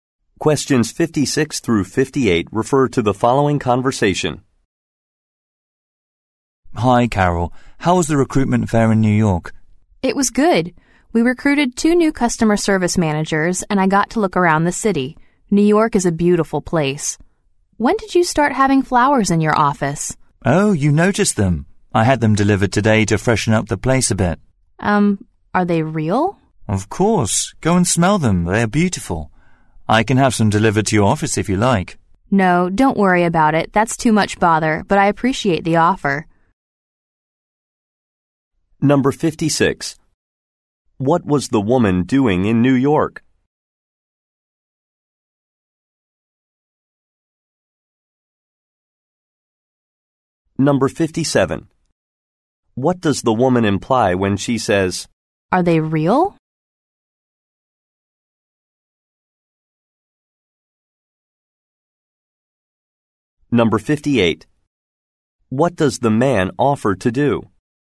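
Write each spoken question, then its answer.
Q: What was the woman doing in New York?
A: Attending a recruitment fair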